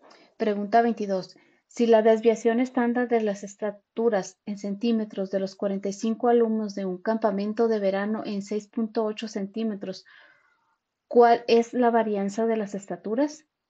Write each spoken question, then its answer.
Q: ¿cuál es la varianza de las estaturas?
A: Y la respuesta correcta es la B, 46.24.